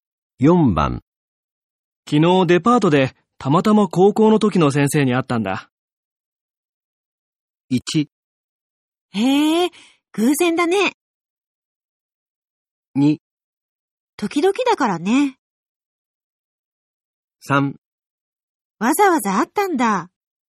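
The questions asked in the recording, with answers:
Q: 昨日デパートでたまたま高校の時の先生に会ったんだ。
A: 1: へえ、偶然だね。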